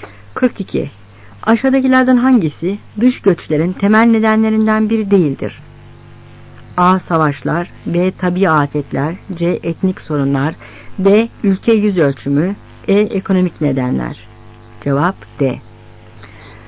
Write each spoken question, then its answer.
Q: Aşağıdakilerden hangisi dış göçlerin temel nedenlerinden biri değildir?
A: Cevap D.